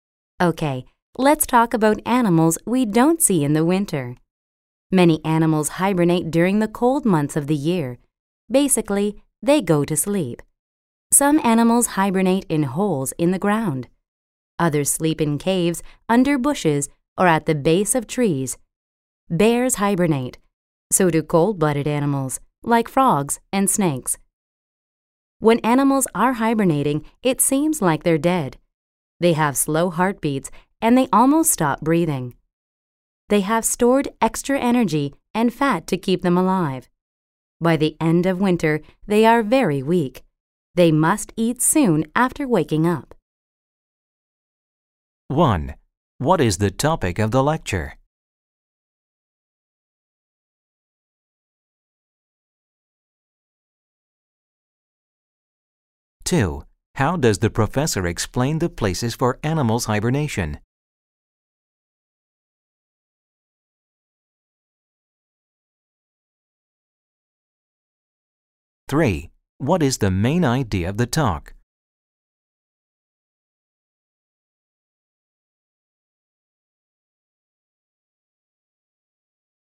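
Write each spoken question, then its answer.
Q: What is the topic of the lecture?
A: Animal hibernation in winter

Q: What is the main idea of the talk?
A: Many animals hibernate (sleep) during the cold winter months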